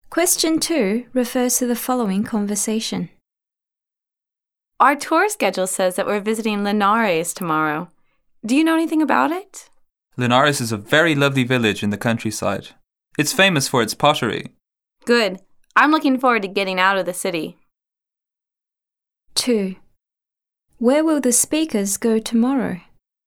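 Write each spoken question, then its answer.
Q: Where will the speakers go tomorrow?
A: To Linares, a village in the countryside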